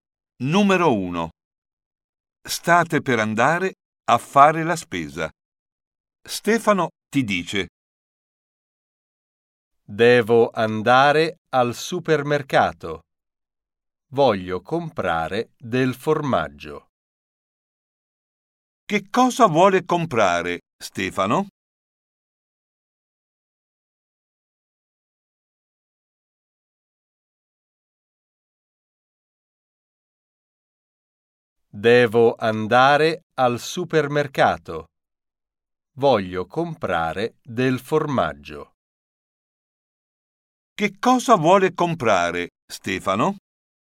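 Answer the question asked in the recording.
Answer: del formaggio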